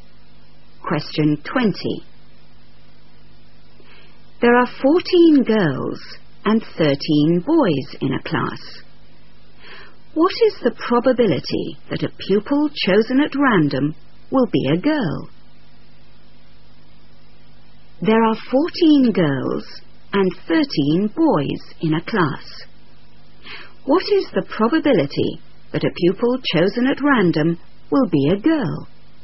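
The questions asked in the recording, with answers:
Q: What is the probability that a pupil chosen at random will be a girl?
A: 14/27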